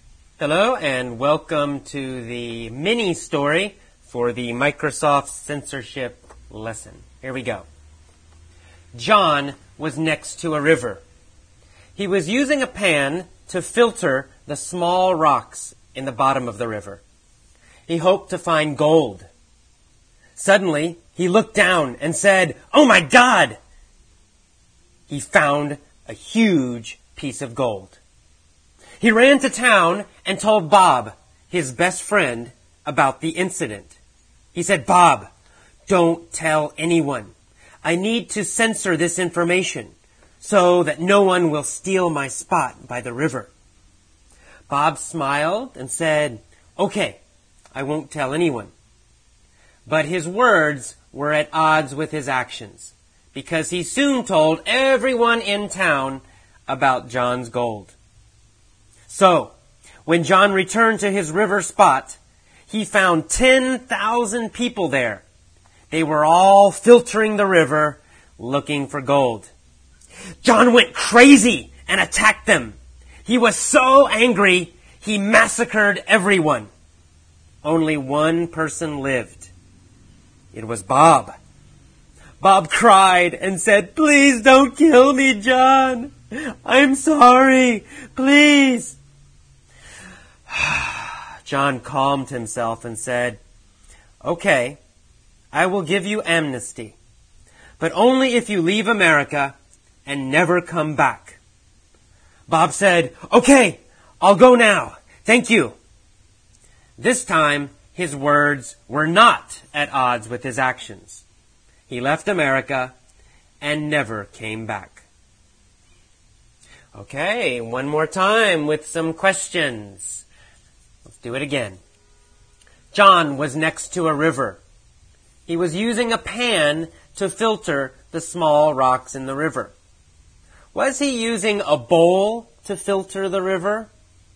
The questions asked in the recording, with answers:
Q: Was he using a bowl to filter the river?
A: No, he wasn't using a bowl.